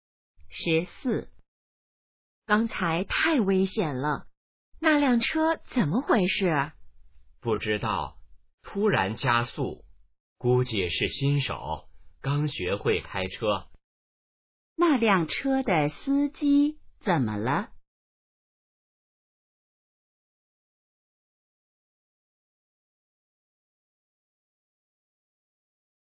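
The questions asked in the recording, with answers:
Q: 那辆车的司机怎么了?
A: 可能是新手,刚学会开车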